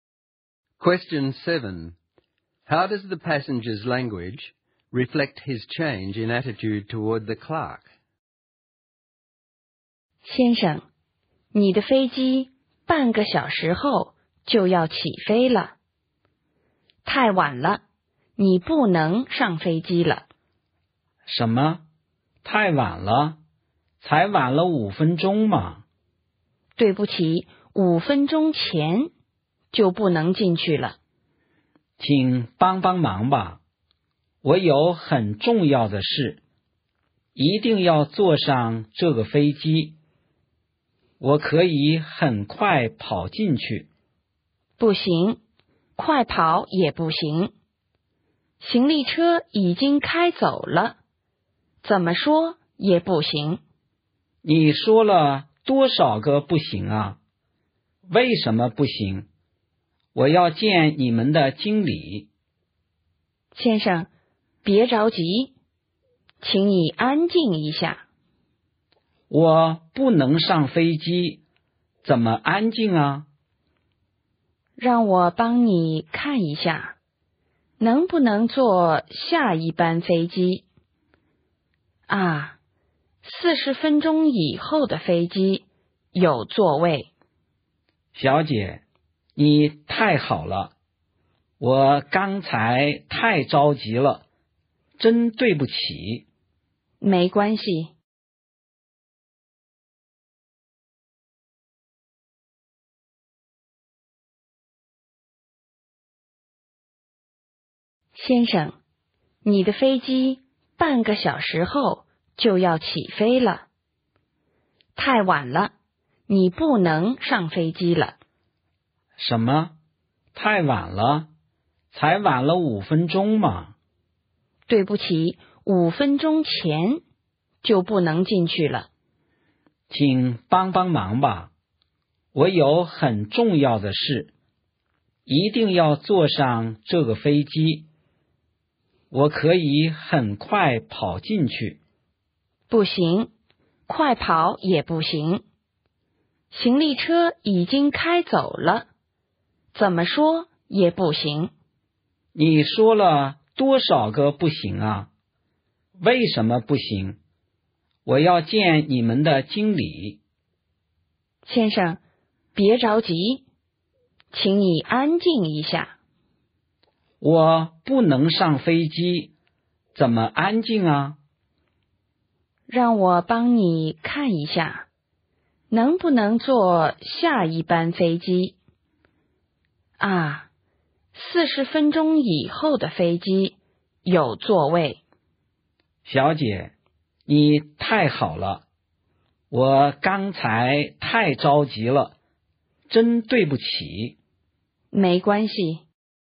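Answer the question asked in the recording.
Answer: At first he is angry and demanding, asking why not and wanting to see the manager. After she finds him a seat on a later flight, he becomes polite and grateful, saying she is very kind and apologising.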